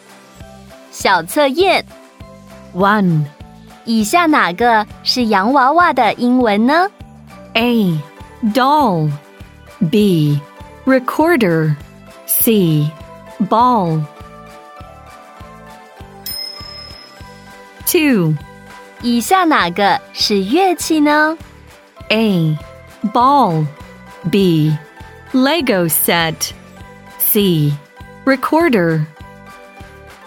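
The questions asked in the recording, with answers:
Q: 以下哪个是洋娃娃的英文呢?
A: A: Doll

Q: 以下哪个是乐器呢?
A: C: Recorder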